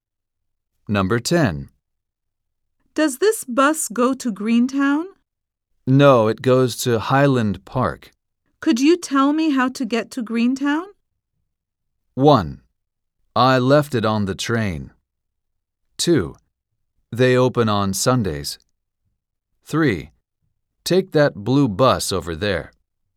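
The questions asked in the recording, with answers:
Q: Could you tell me how to get to Greentown?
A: 3: Take that blue bus over there.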